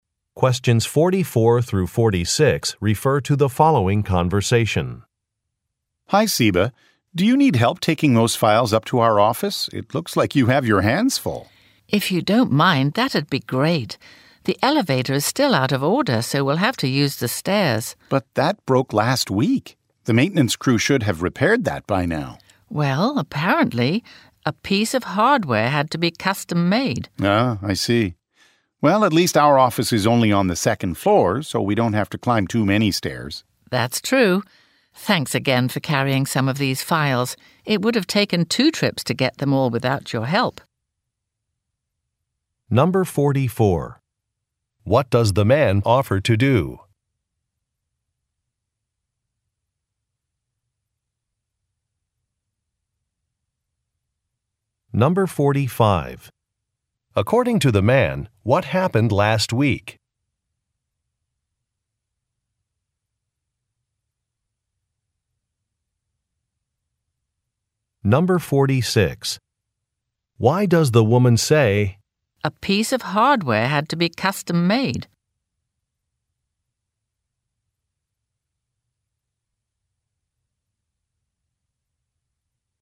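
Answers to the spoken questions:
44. Help carry files up to the office
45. The elevator broke
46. To explain why the elevator has not been repaired yet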